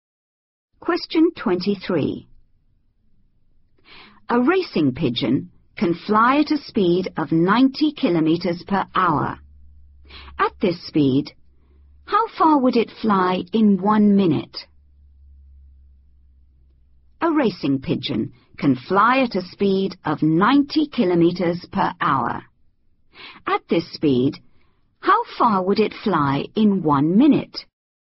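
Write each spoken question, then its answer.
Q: At this speed, how far would it fly in 1 minute?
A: 1.5 km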